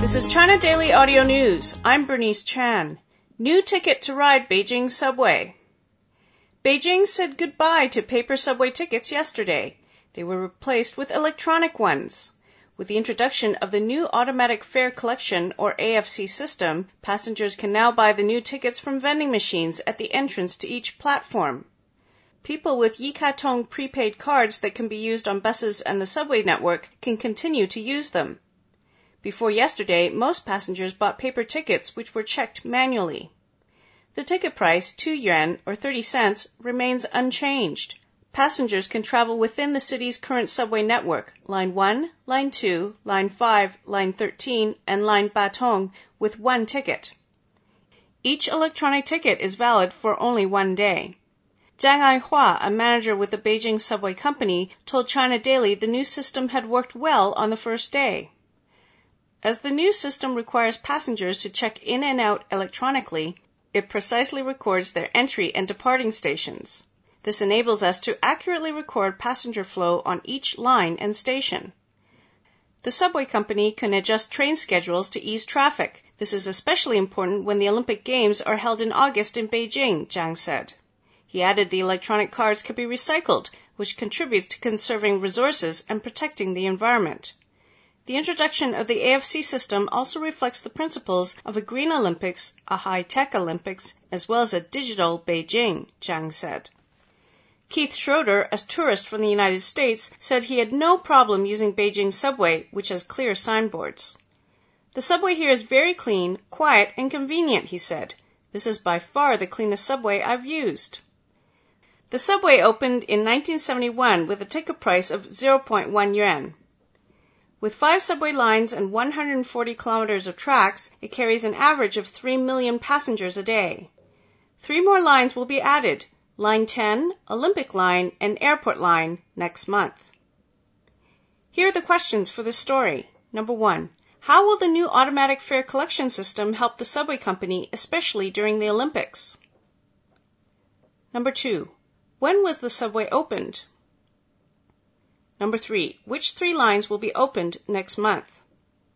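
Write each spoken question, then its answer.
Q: How will the new automatic fare collection system help the subway company, especially during the Olympics?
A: It records passenger flow on each line and station precisely, so the company can adjust train schedules to ease traffic

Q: When was the subway opened?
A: In 1971

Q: Which 3 lines will be opened next month?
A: Line 10, the Olympic Line and the Airport Line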